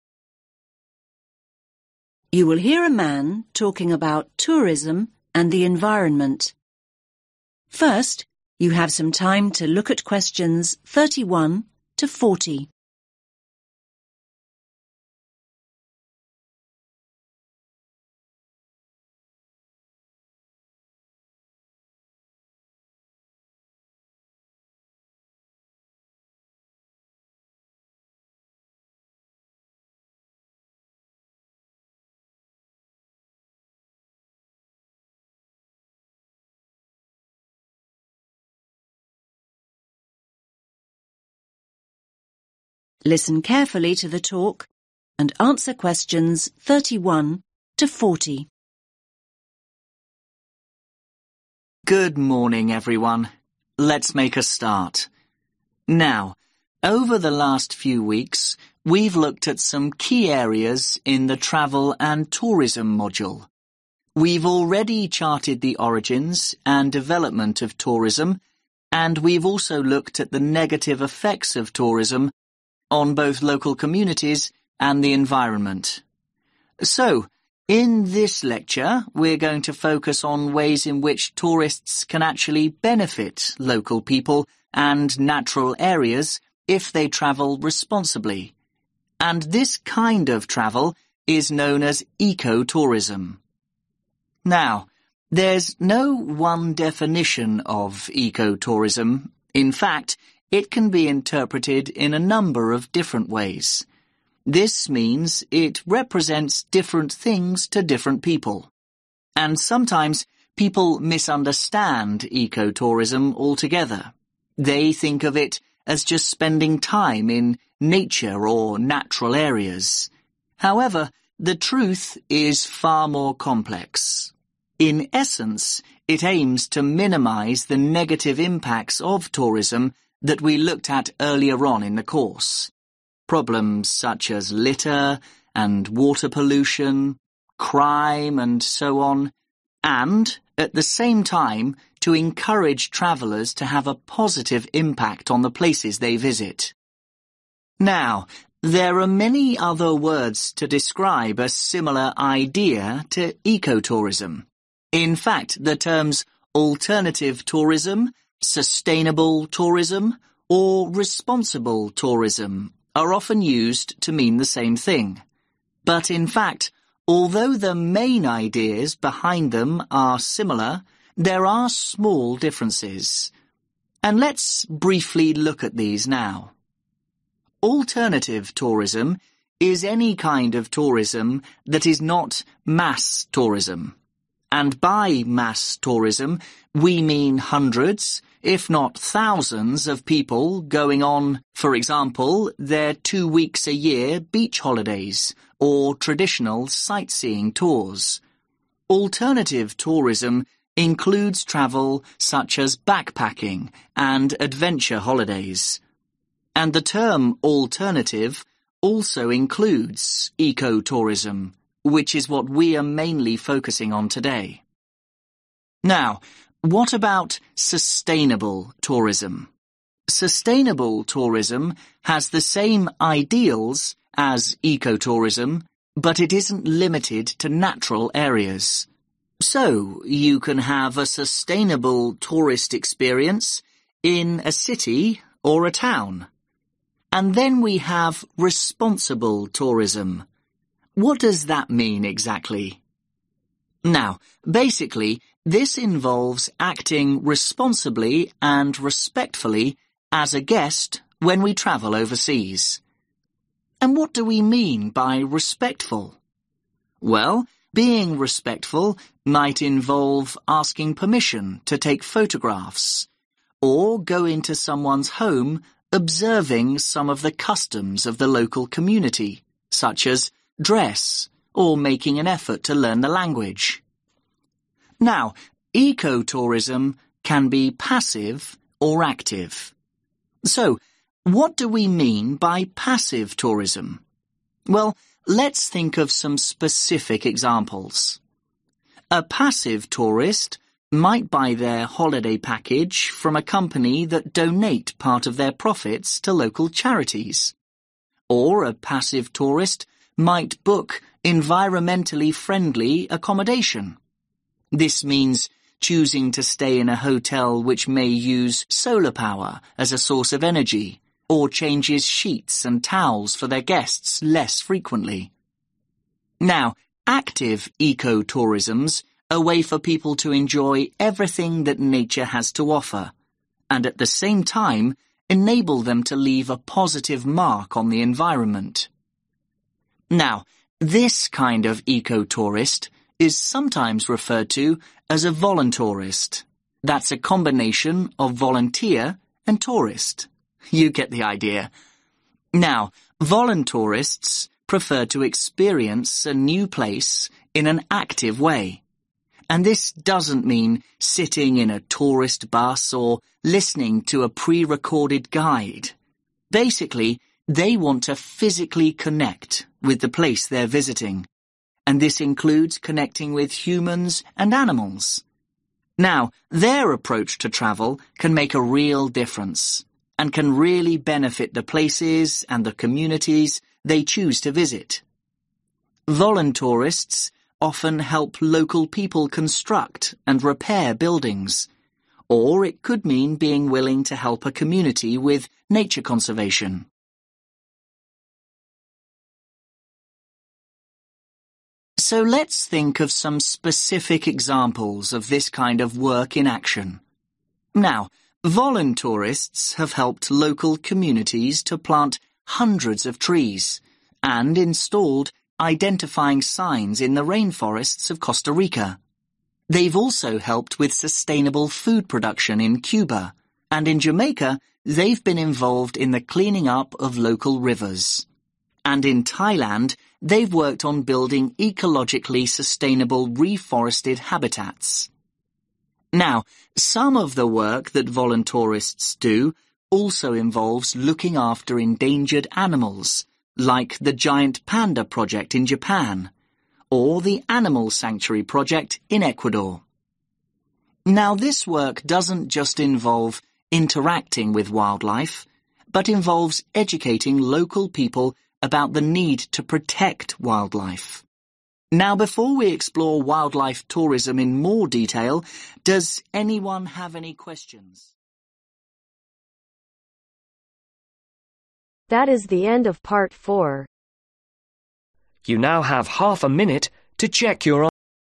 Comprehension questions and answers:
Complete the notes below. Write ONE WORD ONLY for each answer.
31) To reduce then negative (31) .......... of tourism (for example, rubbish, (32) .......... and criminal activity).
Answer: Impacts

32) To reduce then negative (31) .......... of tourism (for example, rubbish, (32) .......... and criminal activity).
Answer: Pollution

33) Examples: water (33) .......... and adventure trips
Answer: Backpacking

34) Shares the same (34) .......... as eco-tourism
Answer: Ideals

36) Involves adhering to local (36) .......... (for example, dress and language)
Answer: Customs

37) Involves assisting with building work in local communities and participating in nature (37) ..........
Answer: Conservation

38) Assistance with sustainable food (38) .......... in Cuba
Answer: Production

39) Cleaning up local (39) .......... in Jamaica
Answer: River

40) Animal conservation in (40) .......... and Ecuador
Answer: Japan